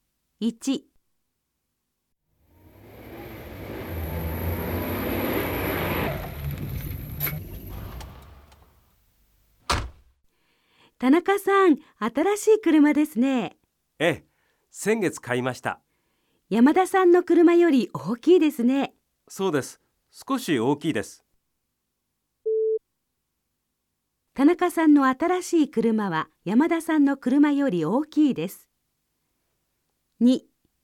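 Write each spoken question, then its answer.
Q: 田中さんの新しい車は山田さんの車より大きいです。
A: ○(正しい)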